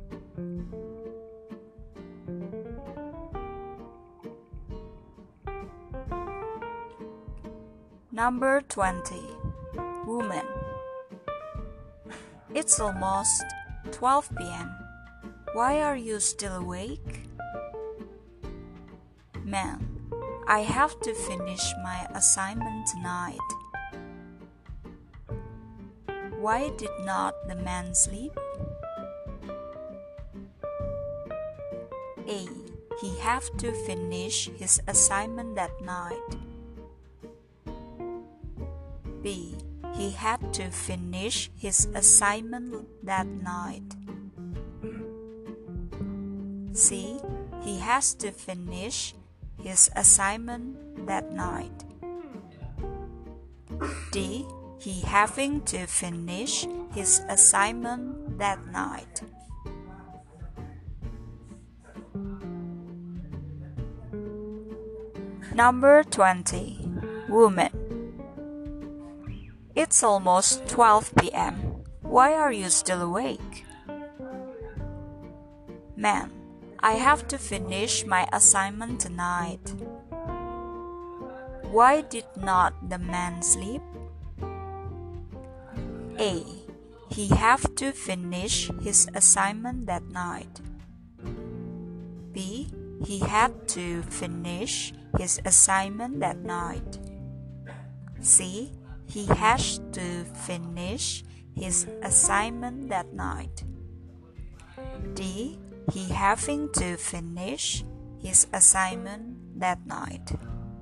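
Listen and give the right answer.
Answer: B: He had to finish his assignment that night.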